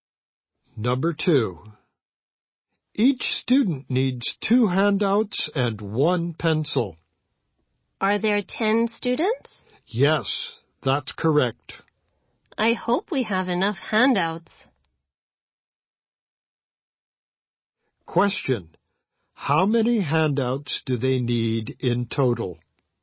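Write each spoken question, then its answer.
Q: How many handouts do they need in total?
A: 20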